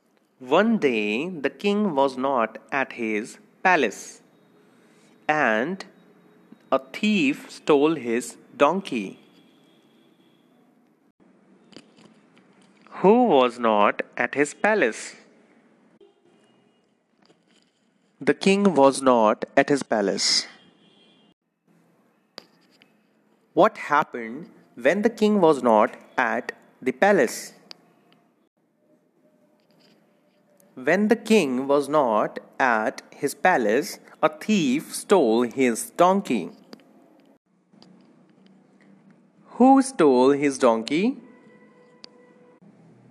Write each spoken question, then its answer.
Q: Who was not at his palace?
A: The king was not at his palace.

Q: Who stole his donkey?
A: A thief stole his donkey.